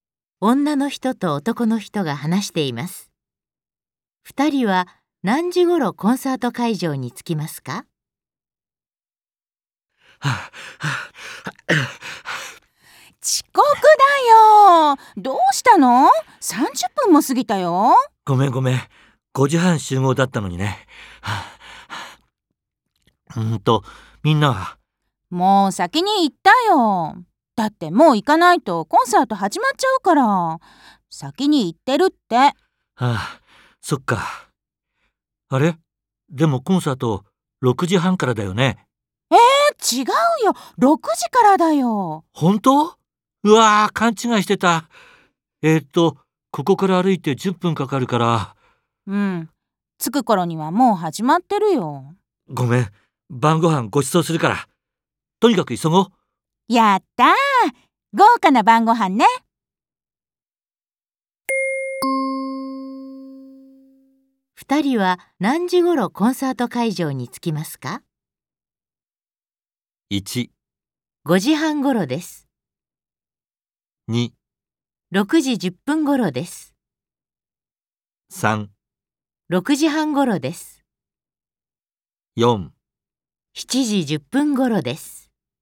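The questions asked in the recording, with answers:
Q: 二人は何時ごろコンサート会場に着きますか?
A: 2: 6時10分ごろです。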